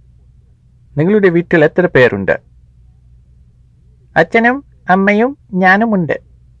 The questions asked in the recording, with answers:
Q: നിങ്ങളുടെ വീട്ടിൽ എത്ര പേരുണ്ട്?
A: മൂന്ന് പേരുണ്ട്.